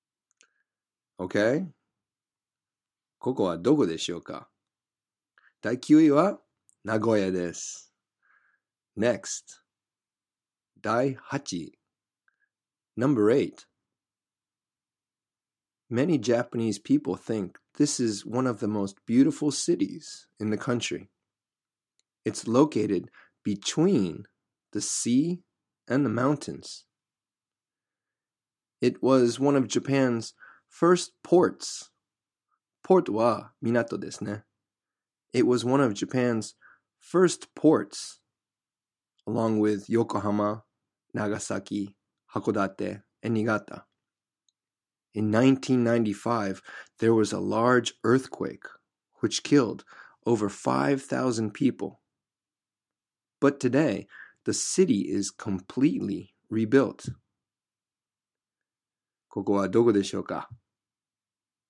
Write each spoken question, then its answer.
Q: ここはどこでしょうか?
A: はい、神戸でした。